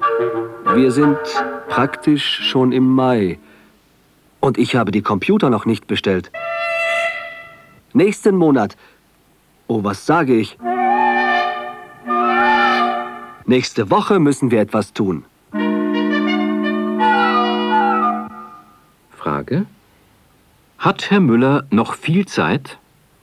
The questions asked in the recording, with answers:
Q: Hat Herr Müller noch viel Zeit?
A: Nein, er hat nicht mehr viel Zeit.